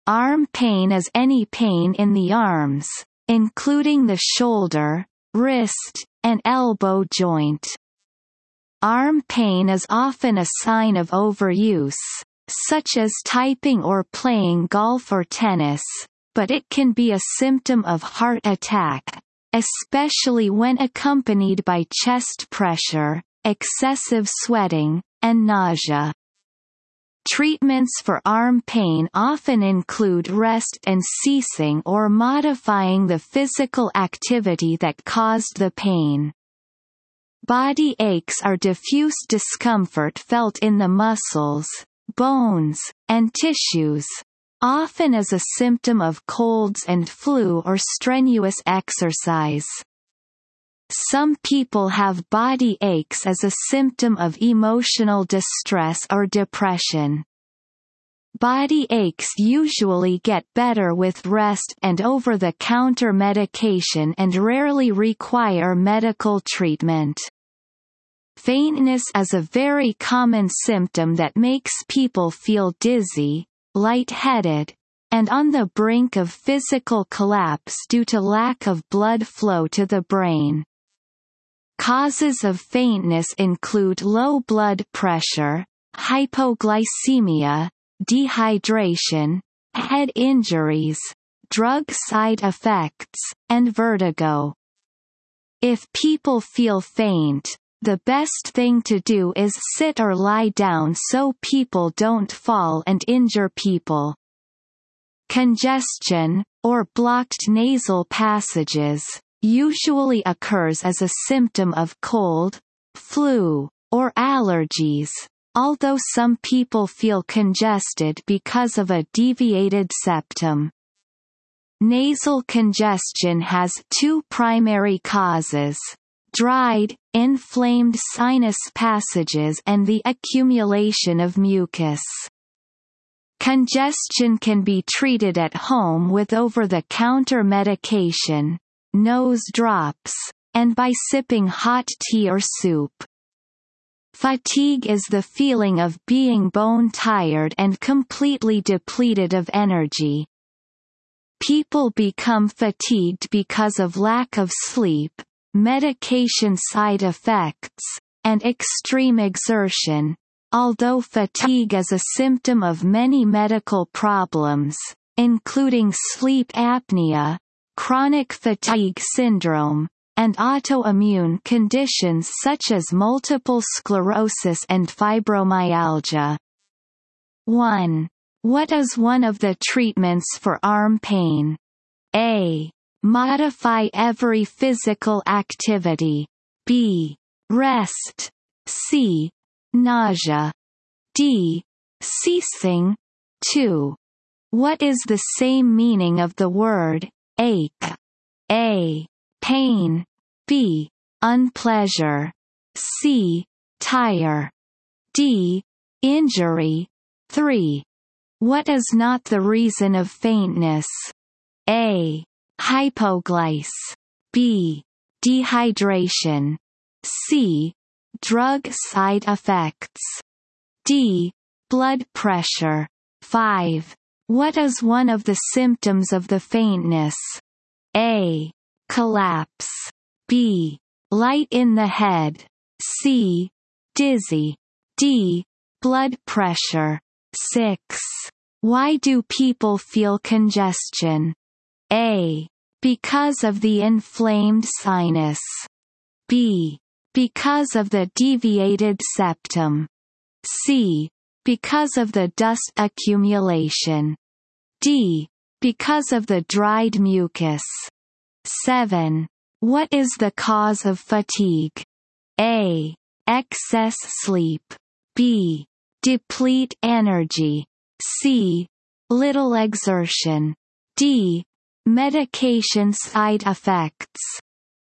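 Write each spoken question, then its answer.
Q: What is one of the treatments for arm pain?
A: B: Rest.

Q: What is the same meaning of the word ache?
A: A: Pain.

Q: What is the cause of fatigue?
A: D: Medication side effects.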